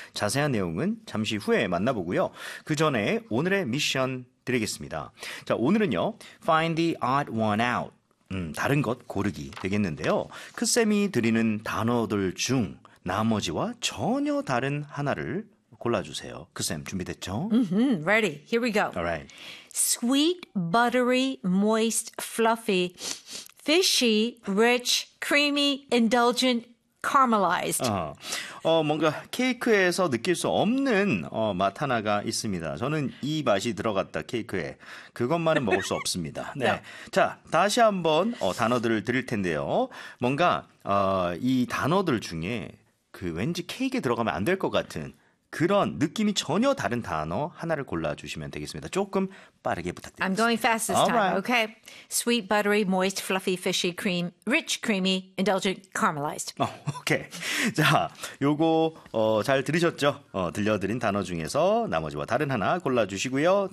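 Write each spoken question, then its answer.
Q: 크쌤이 드리는 단어들 중 나머지와 전혀 다른 하나를 골라주세요.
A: fishy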